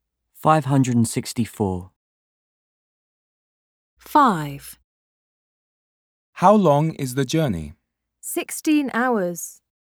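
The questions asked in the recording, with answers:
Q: How long is the journey?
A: 16 hours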